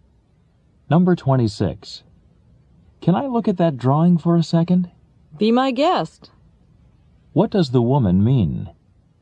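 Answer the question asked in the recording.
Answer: He may look at the drawing.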